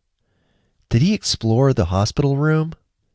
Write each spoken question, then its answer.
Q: Did he explore the hospital room?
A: Yes, he explored the hospital room.